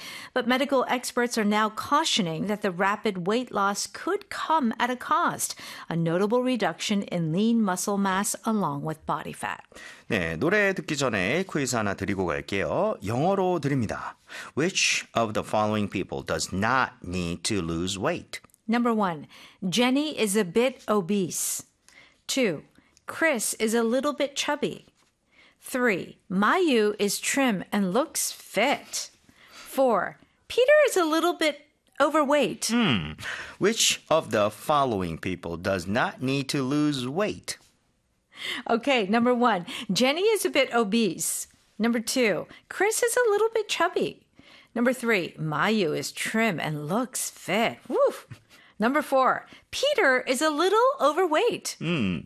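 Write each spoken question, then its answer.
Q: Which of the following people does not need to lose weight?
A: 3: Mayu is trim and looks fit.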